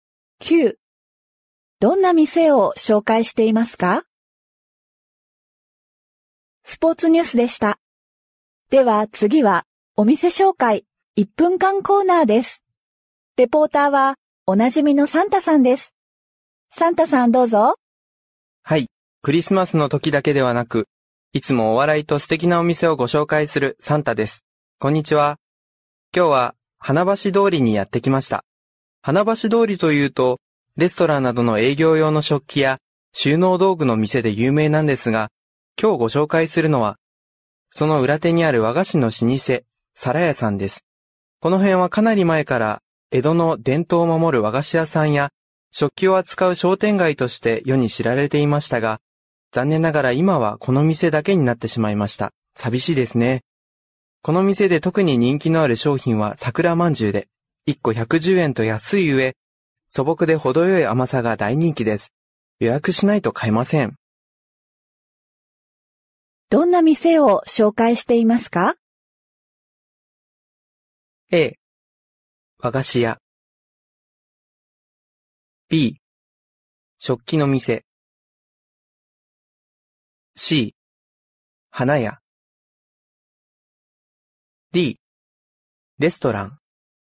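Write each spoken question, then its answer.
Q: どんな店を紹介していますか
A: A: 和菓子屋。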